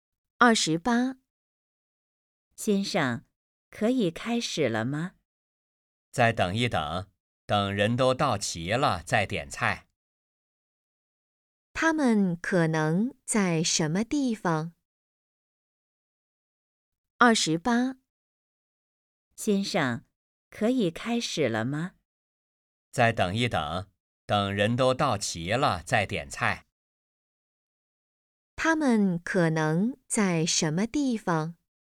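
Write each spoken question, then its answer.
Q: 他们可能在什么地方?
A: 饭馆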